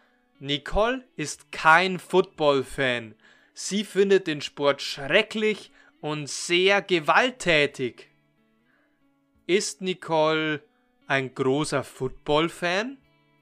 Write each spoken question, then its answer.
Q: Ist Nicole ein großer Football-Fan?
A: Nein, Nicole ist kein großer Football-Fan.